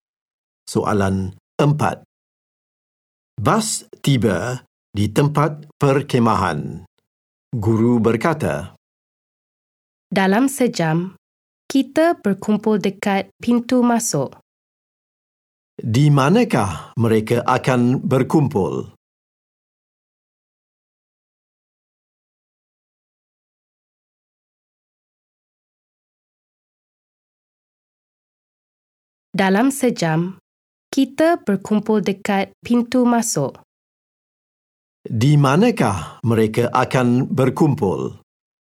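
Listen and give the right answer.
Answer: Dekat pintu masuk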